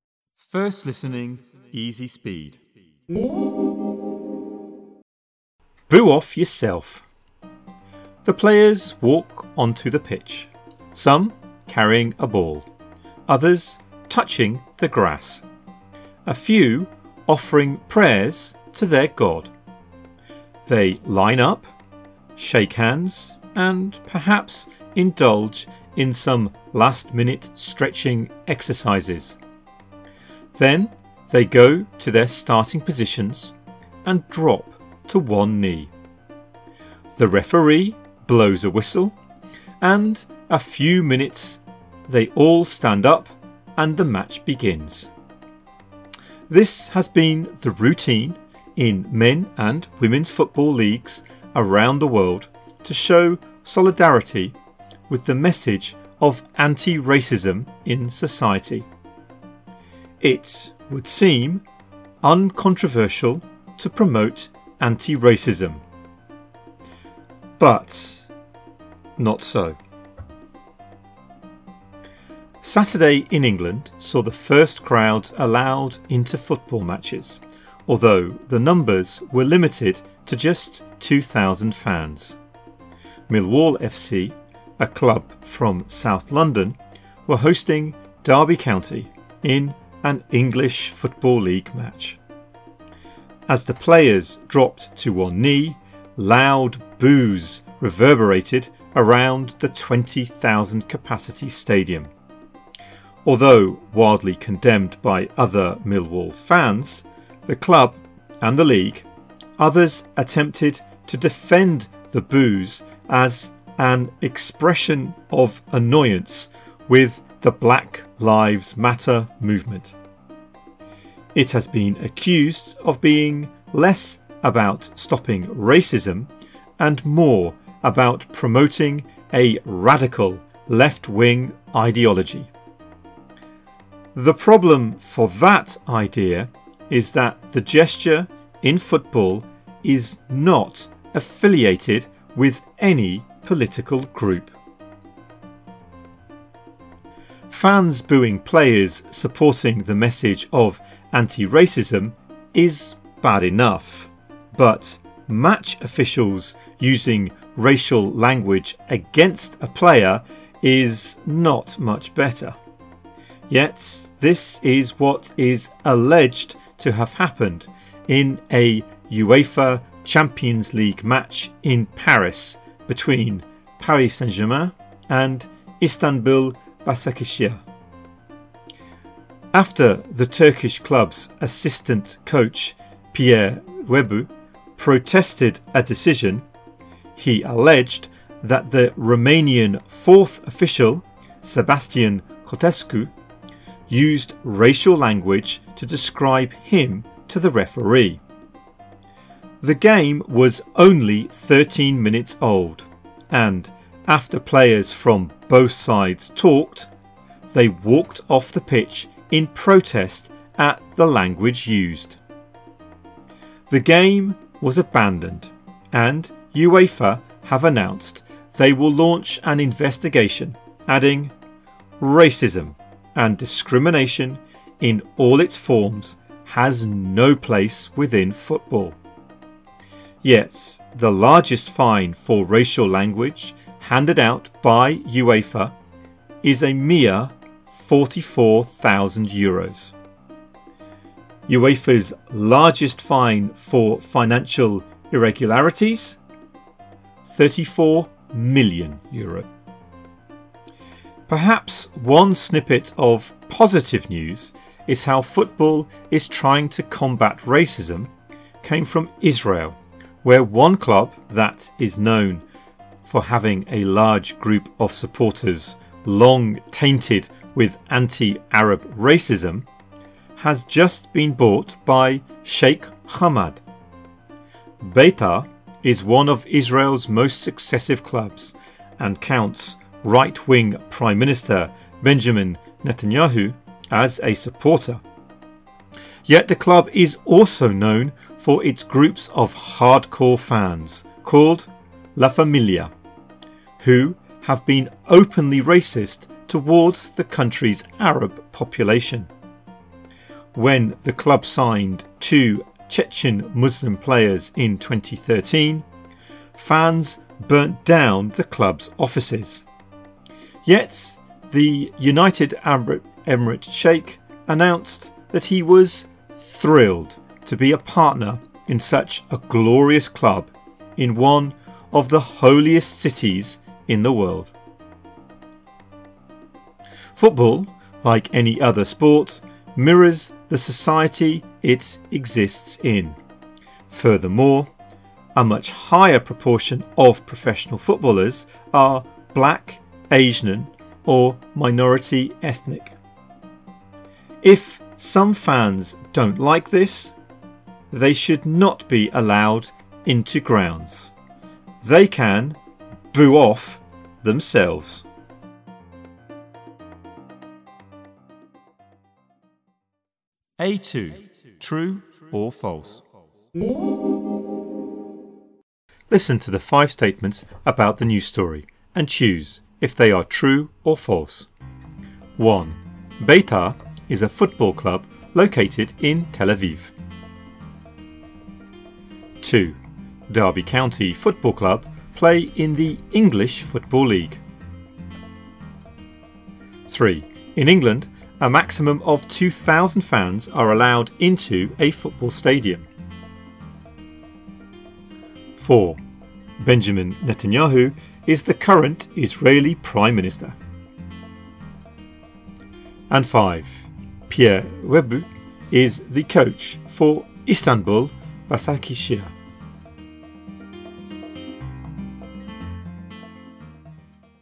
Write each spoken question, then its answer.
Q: Derby County Football Club play in the English Football League.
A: 2, true.

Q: In England, a maximum of 2,000 fans are allowed into a football stadium.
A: 3, true.

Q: Benjamin Netanyahu is the current Israeli Prime Minister.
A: 4, true.

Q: Pierre Webu is the coach for Istanbul Basakishir.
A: 5, false.